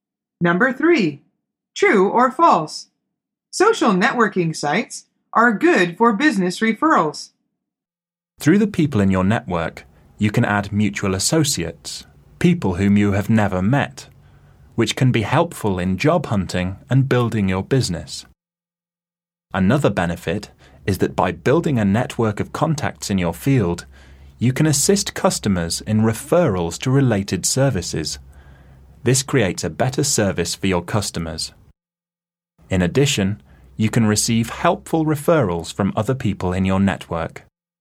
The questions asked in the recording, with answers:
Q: Social networking sites are good for business referrals.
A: The answer is true.